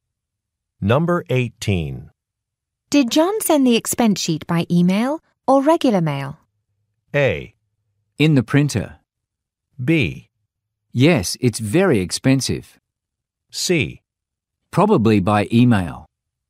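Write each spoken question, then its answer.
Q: Did John send the expense sheet by email or regular mail?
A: C: Probably by email.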